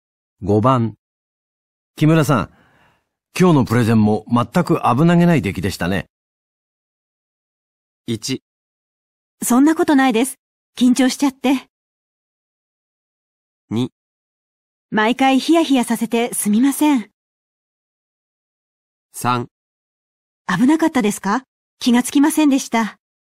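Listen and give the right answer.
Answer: 1: そんなことないです。緊張しちゃって。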